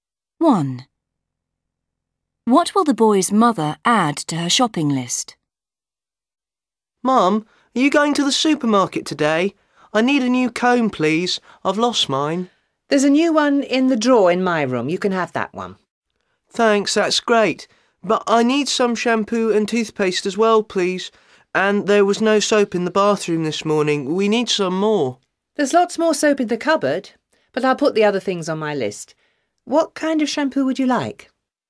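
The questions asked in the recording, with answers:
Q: What will the boy's mother add to her shopping list?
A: shampoo and toothpaste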